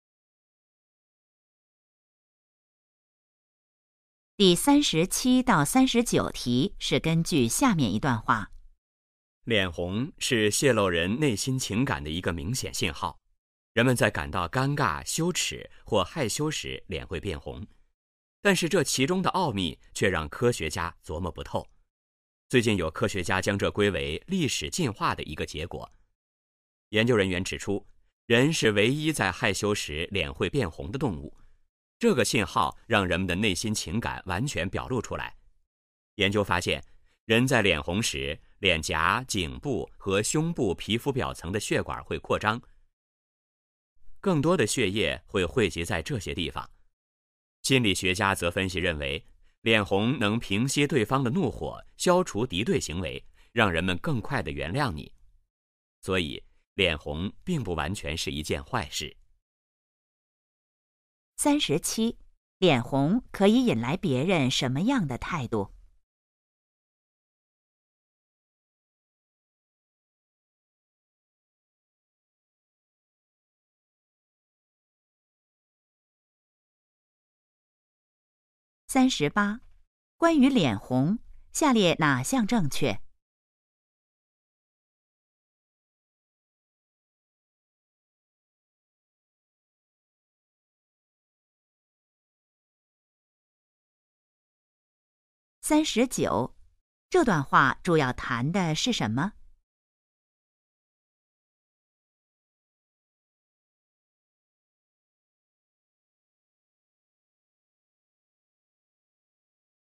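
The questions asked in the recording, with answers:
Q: 脸红可以引来别人什么样的态度?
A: 更快地原谅你

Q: 这段话主要谈的是什么?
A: 脸红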